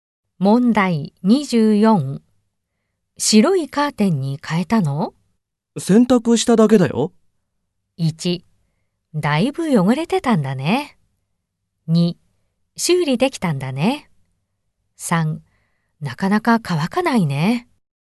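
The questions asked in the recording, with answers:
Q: 白いカーテンに変えたの?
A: 3: だいぶ汚れてたんだね。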